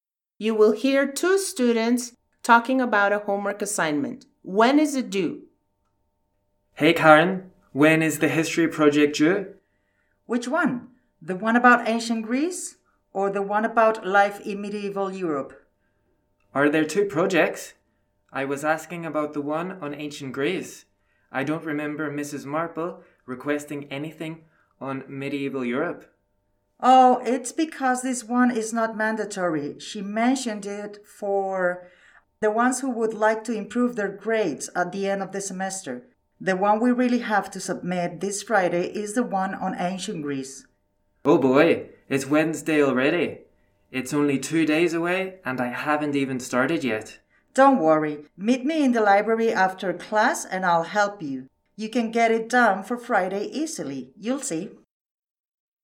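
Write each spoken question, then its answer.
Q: When is it due?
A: This Friday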